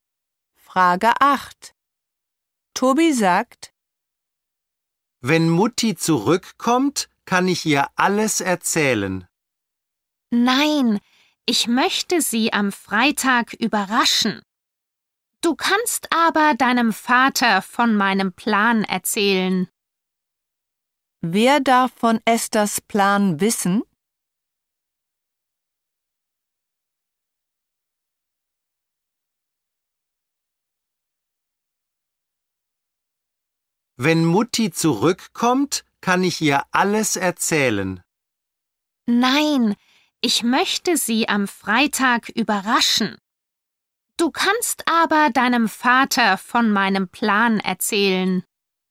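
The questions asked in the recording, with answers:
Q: Wer darf von Esthers Plan wissen?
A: Tobis Vater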